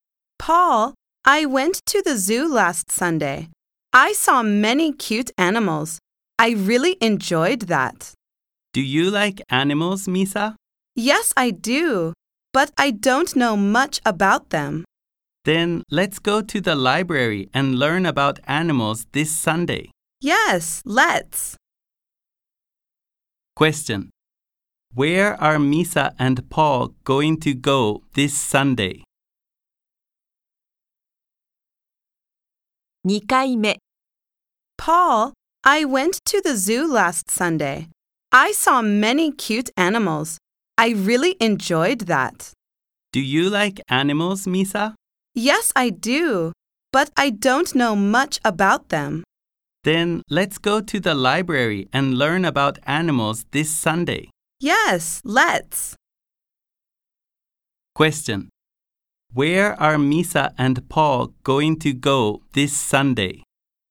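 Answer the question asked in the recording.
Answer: To the library.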